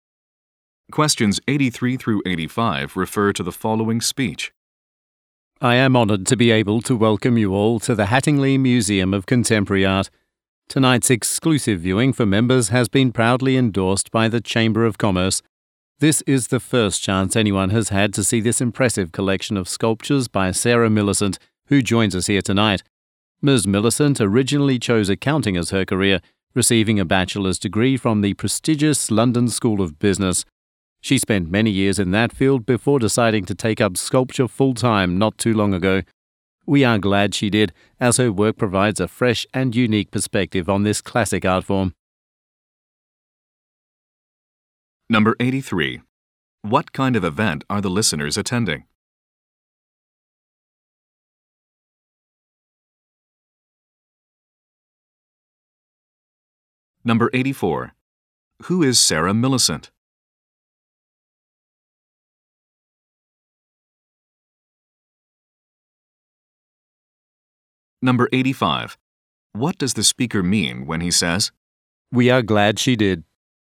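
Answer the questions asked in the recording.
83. An exclusive members' viewing of a sculpture exhibition
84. A sculptor (formerly an accountant)
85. He is pleased she changed careers to become a sculptor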